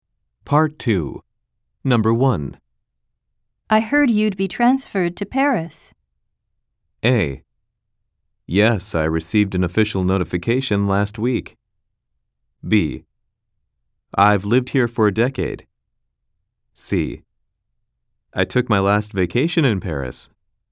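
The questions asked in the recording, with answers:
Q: I heard you'd be transferred to Paris.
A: A: Yes, I received an official notification last week.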